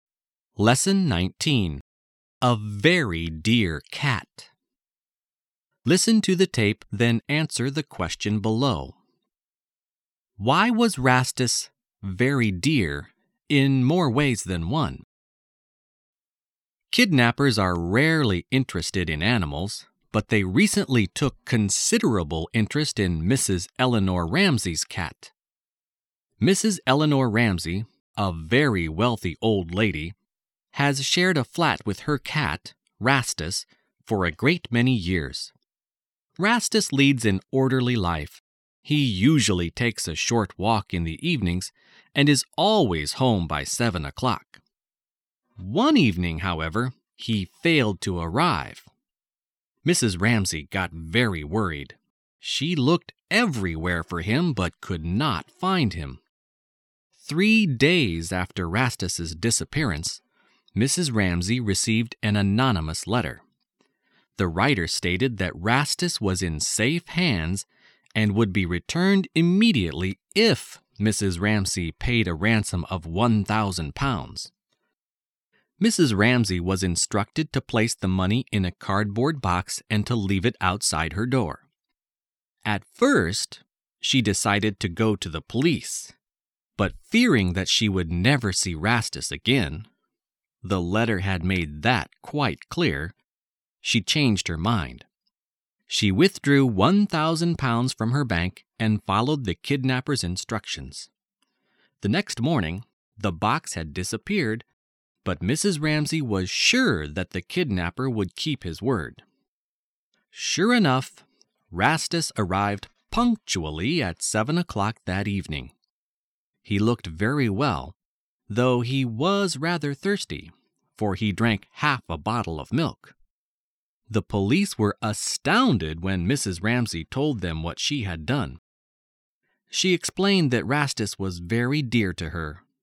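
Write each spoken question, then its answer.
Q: Why was Rastus very dear in more ways than one?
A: Mrs. Ramsey loved him very much, and she paid a ransom of £1,000 to get him back.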